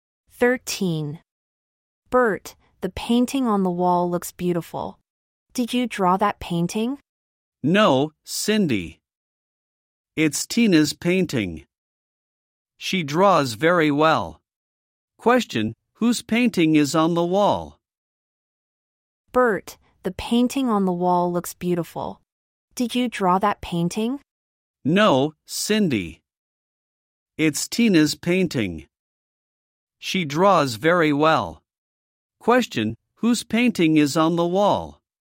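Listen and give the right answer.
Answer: Tina's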